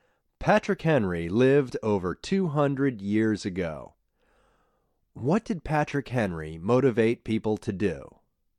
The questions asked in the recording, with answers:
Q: What did Patrick Henry motivate people to do?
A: Patrick Henry motivated people to fight the British.